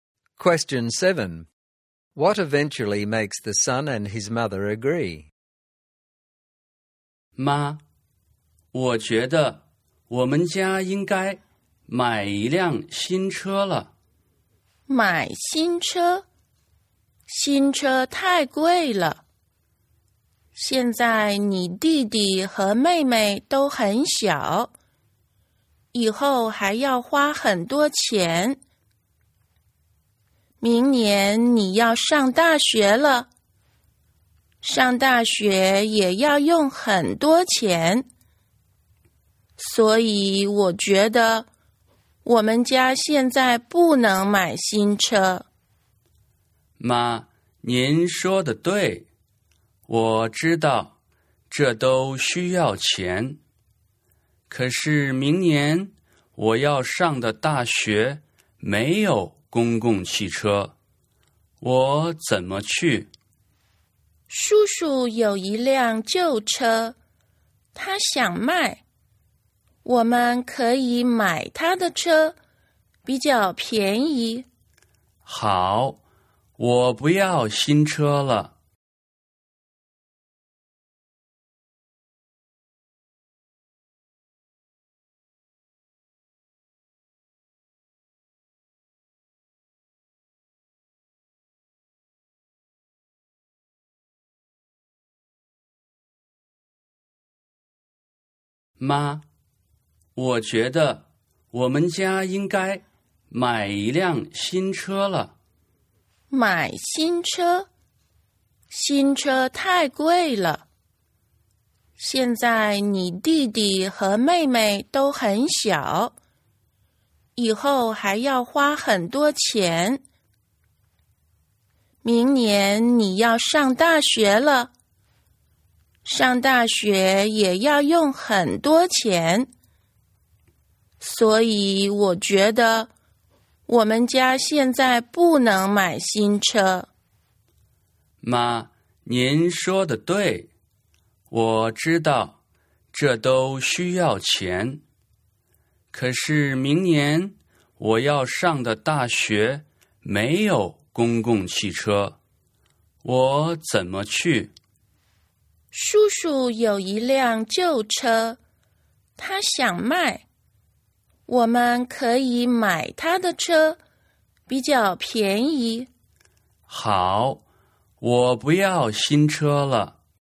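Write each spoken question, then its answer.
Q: What eventually makes the son and his mother agree?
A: He suggests buying his uncle's cheaper old car, since there is no bus to his university.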